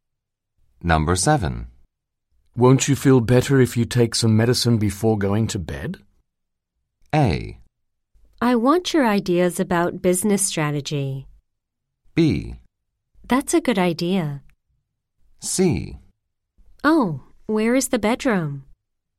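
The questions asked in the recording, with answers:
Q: Won't you feel better if you take some medicine before going to bed?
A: B: That's a good idea.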